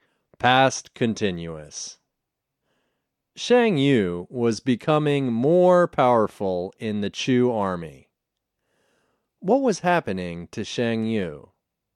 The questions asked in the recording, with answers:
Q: What was happening to Shang Yu?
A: He was becoming more powerful in the Chu army.